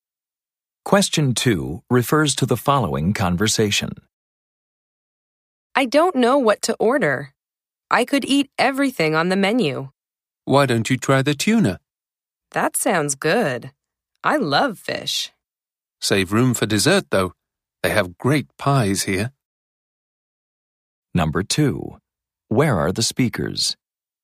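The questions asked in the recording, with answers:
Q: Where are the speakers?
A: In a restaurant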